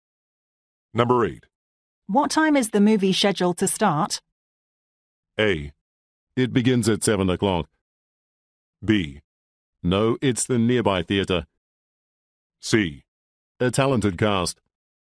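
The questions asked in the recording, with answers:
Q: What time is the movie scheduled to start?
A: A: It begins at 7 o'clock.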